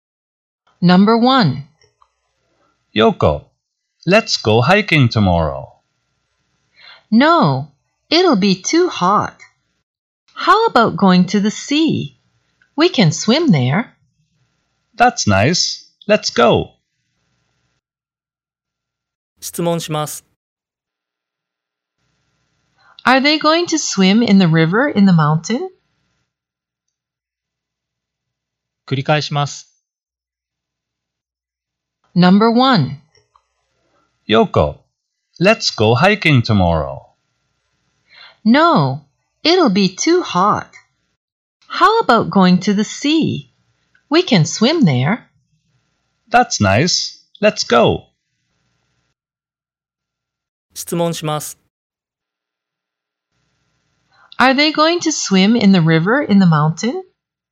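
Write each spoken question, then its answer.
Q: Are they going to swim in the river in the mountain?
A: No, they aren't. They are going to swim in the sea.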